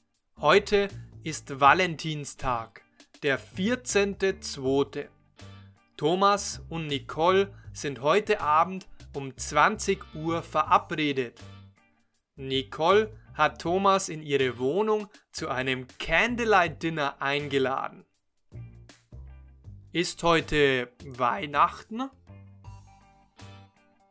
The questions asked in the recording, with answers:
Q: Ist heute Weihnachten?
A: Nein, heute ist nicht Weihnachten.